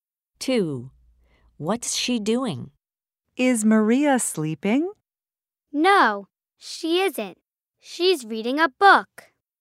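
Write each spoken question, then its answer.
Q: What's she doing?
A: She's reading a book.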